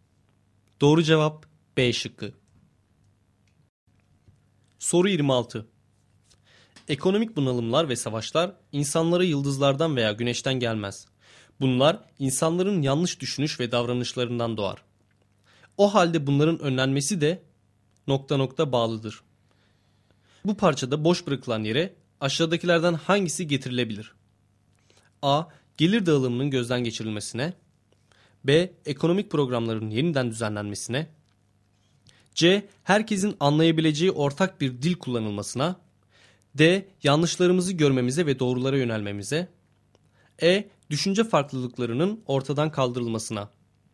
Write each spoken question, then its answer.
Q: Bu parçada boş bırakılan yere aşağıdakilerden hangisi getirilebilir?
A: Doğru cevap D.